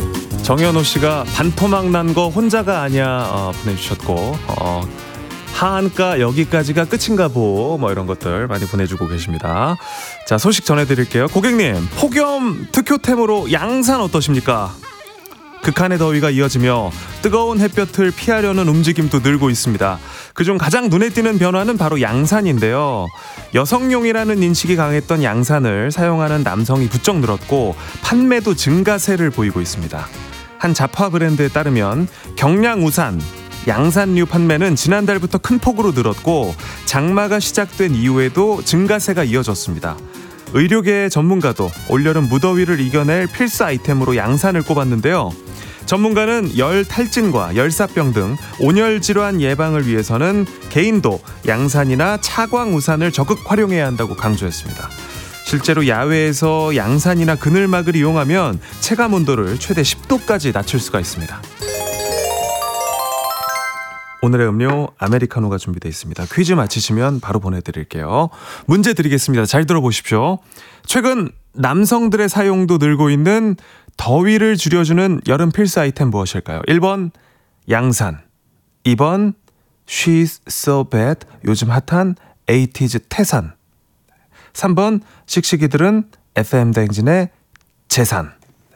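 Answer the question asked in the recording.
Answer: 1: 양산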